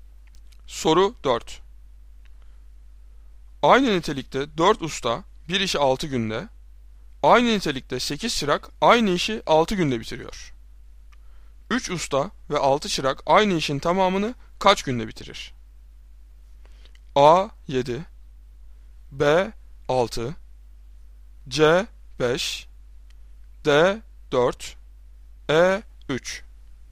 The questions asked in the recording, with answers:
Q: 3 usta ve 6 çırak aynı işin tamamını kaç günde bitirir?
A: Doğru cevap D 4.